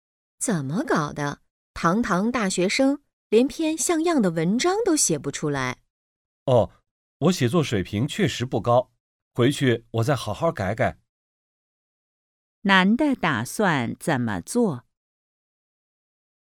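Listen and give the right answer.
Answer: 回去好好修改文章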